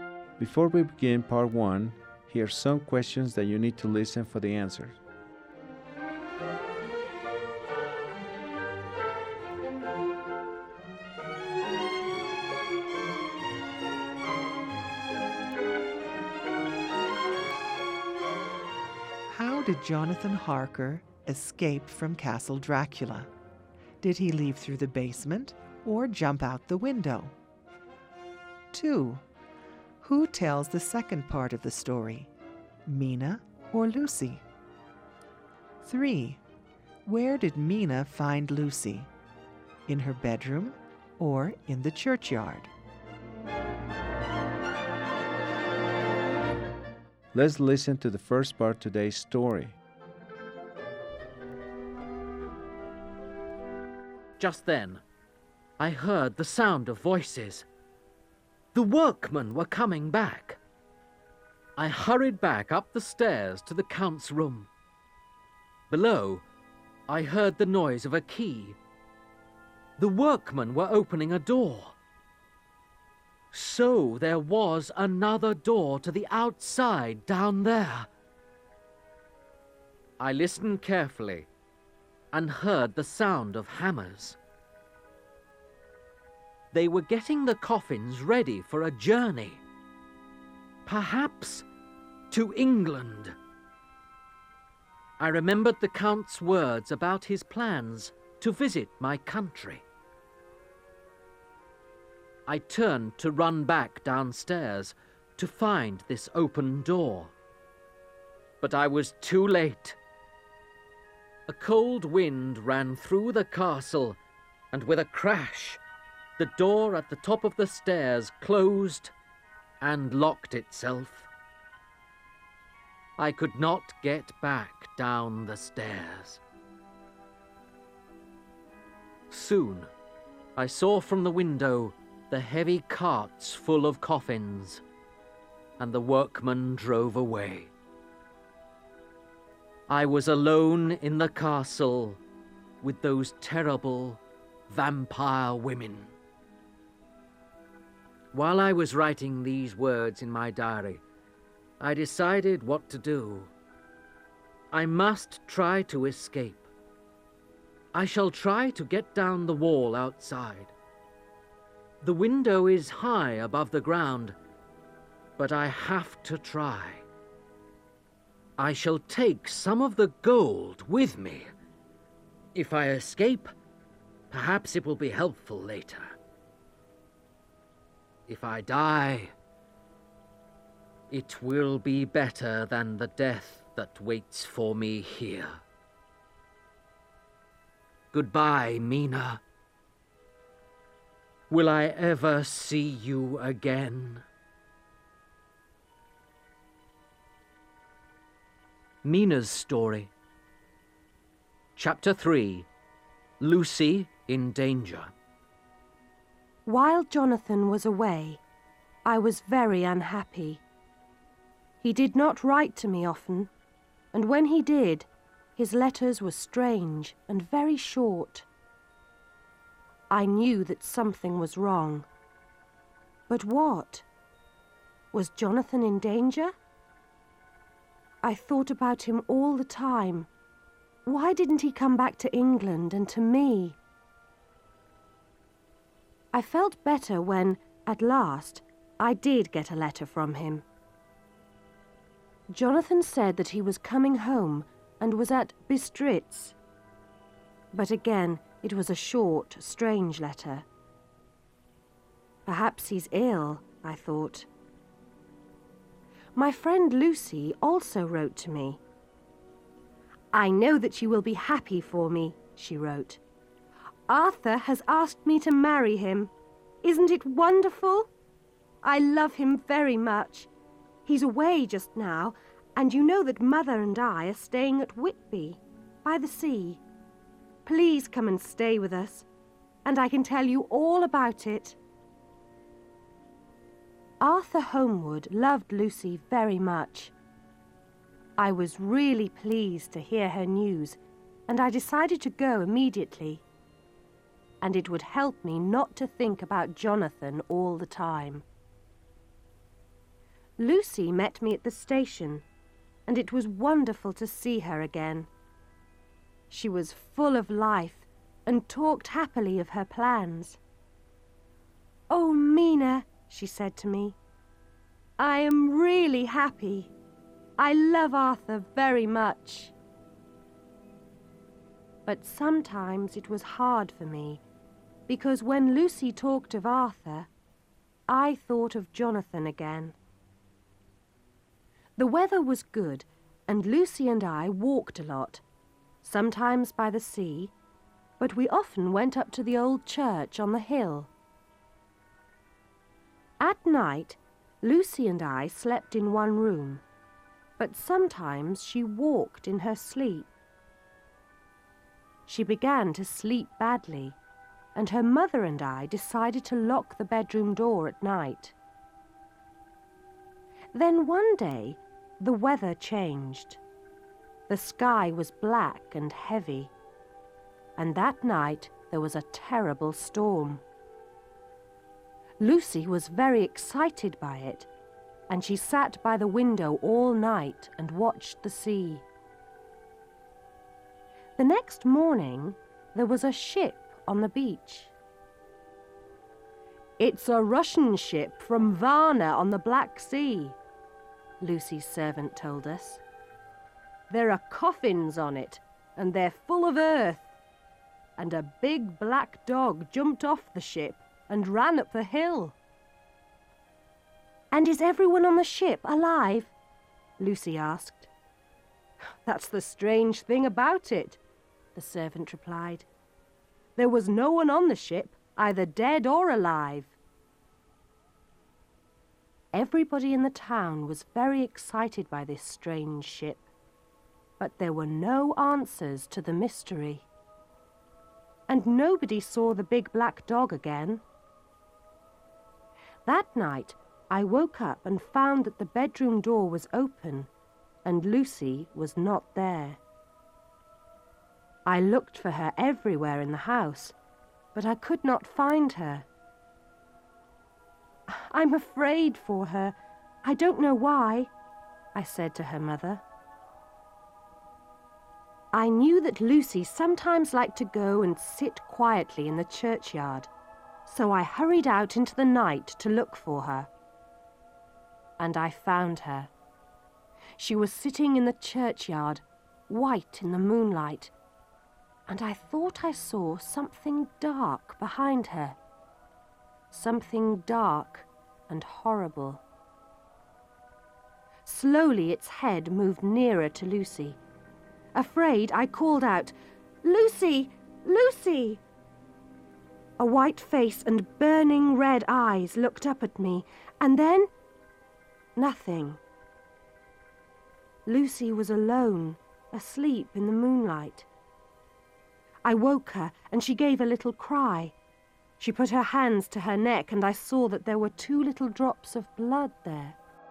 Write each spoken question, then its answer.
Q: Who tells the second part of the story, Mina or Lucy?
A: Mina begins to tell her story.

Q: Where did Mina find Lucy?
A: Nina found Lucy in the churchyard.